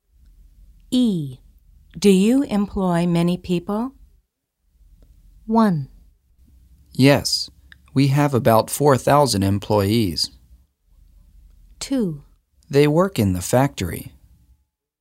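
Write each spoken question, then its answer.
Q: Do you employ many people?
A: 1: Yes, we have about 4,000 employees.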